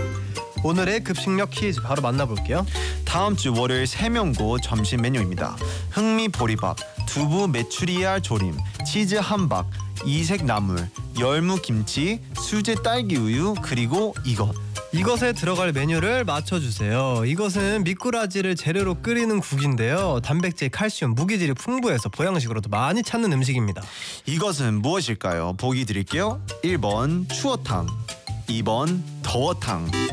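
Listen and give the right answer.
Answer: 1: 추어탕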